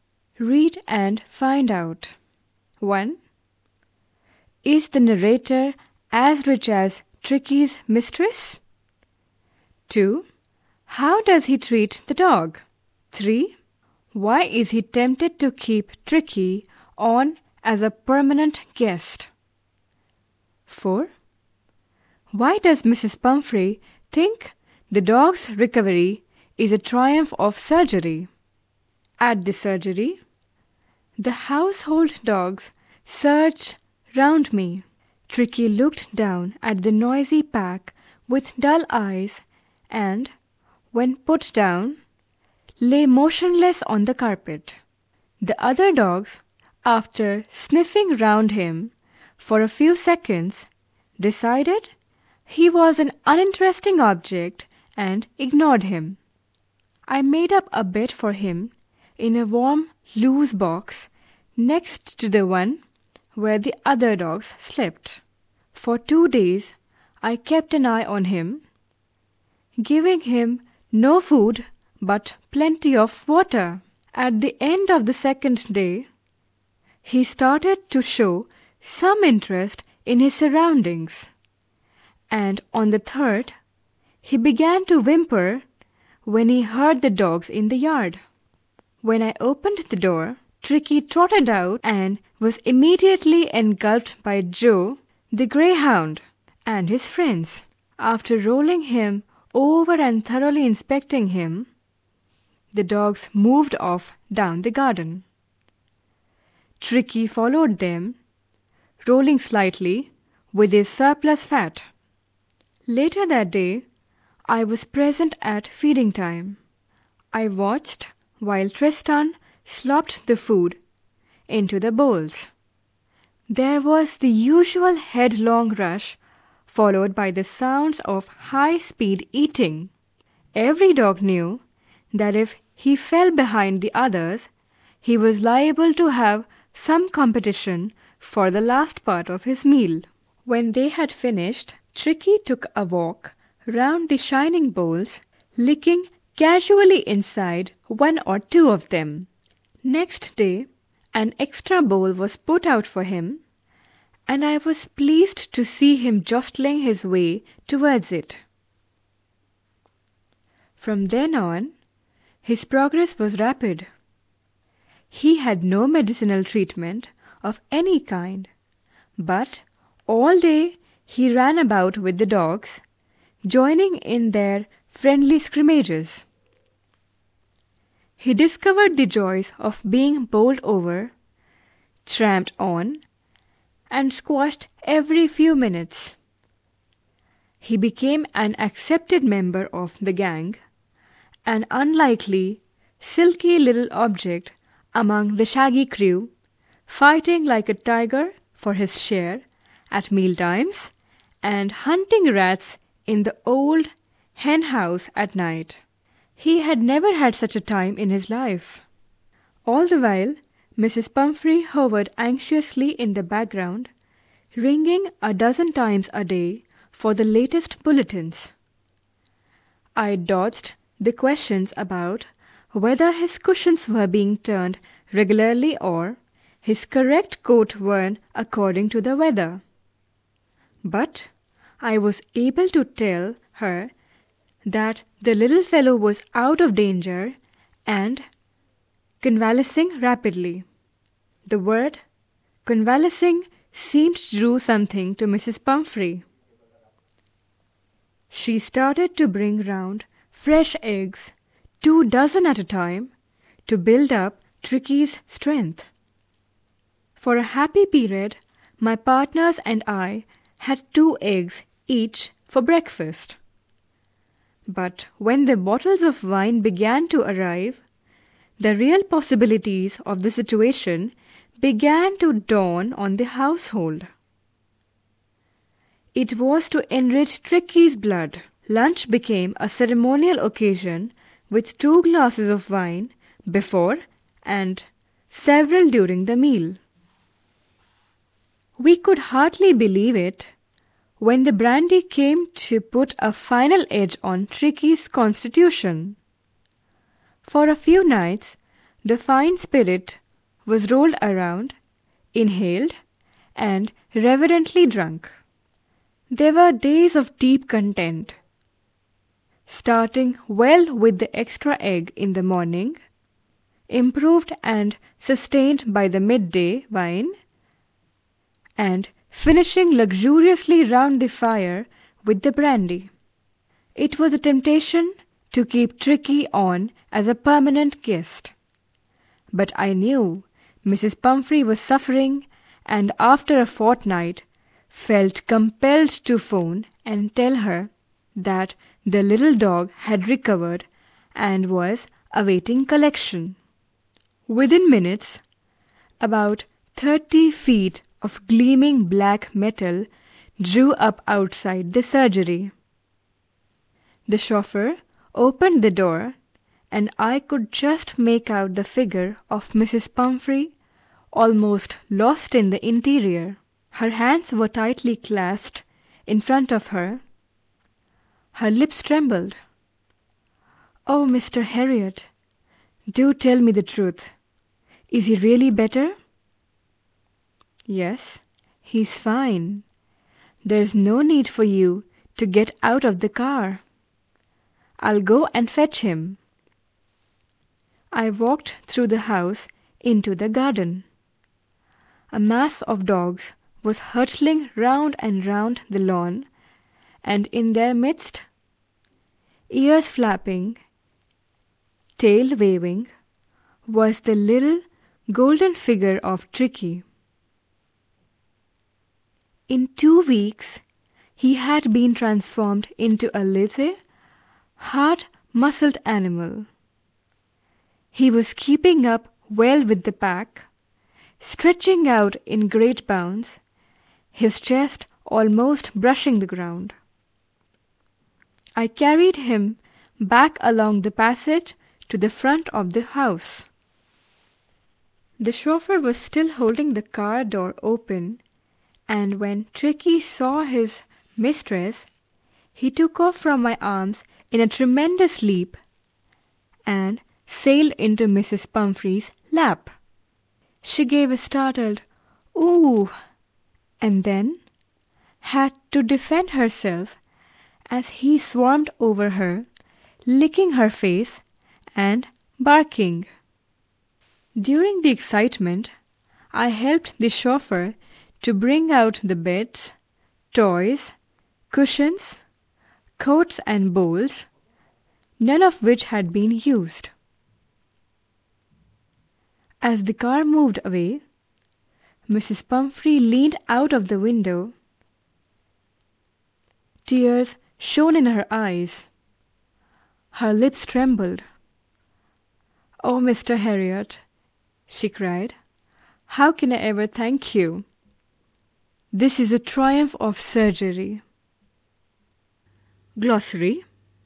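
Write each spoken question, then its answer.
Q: How does he treat the dog?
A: He gives him no food for two days, only water, and then lets him run and eat with the other dogs, with no medicine

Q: Why is he tempted to keep Tricky on as a permanent guest?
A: Because Mrs. Pumphrey keeps sending eggs, wine and brandy, which the household enjoys

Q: Why does Mrs. Pumphrey think the dog's recovery is a triumph of surgery?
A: She doesn't know he was only cured by diet and exercise, so she thinks the vet's treatment worked a miracle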